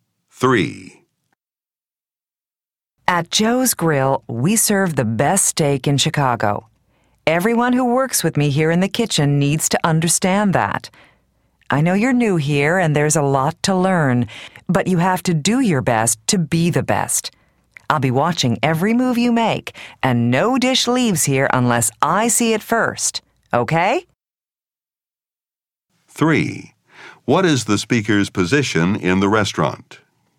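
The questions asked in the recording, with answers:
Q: What is the speaker's position in the restaurant?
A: Head chef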